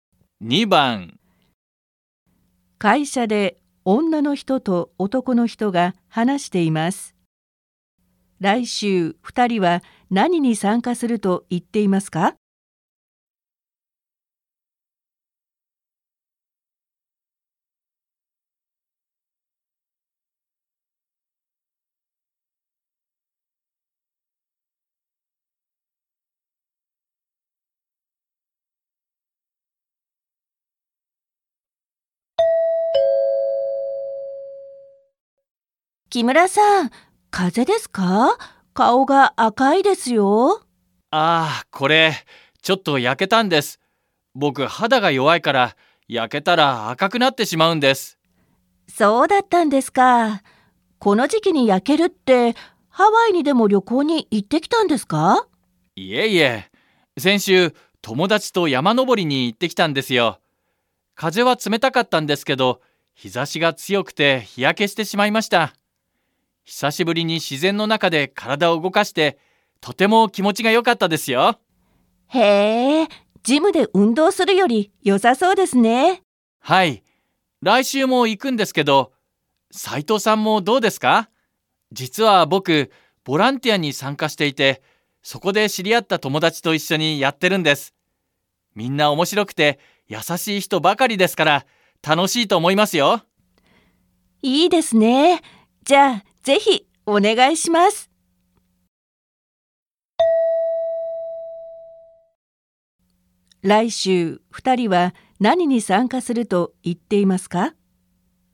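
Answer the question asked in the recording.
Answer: 山登り

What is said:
会社で女の人と男の人が話しています。来週、二人は何に参加すると言っていますか。
F 木村さん、風邪ですか。顔が赤いですよ。/ Kimura, cậu bị cảm cúm à. Mặt cậu đỏ thế.
M あ、これ、ちょっと焼けたんです。僕、肌が弱いから焼けたら赤くなってしまうんです。
F そうだったんですか。この時期に焼けるって、ハワイにでも旅行に行ってきたんですか。
先週、友だちと山登りに行ってきたんですよ。風は冷たかったんですけど、日差しが強くて日焼けしてしまいました。久しぶりに自然の中で体を動かして、とても気持ちがよかったですよ。
F へえ、ジムで運動するよりよさそうですね。/ Nghe có vẻ thích hơn đi tập Gym nhỉ.
M はい、来週も行くんですけど、斉藤さんもどうですか。実は、僕、ボランティアに参加していて、そこで知り合った友達と一緒にやってるんです。みんな面白くて優しい人ばかりですから、楽しいと思いますよ/ Uhm, tuần sau tớ cũng đi đấy, Saito cũng đi cùng không?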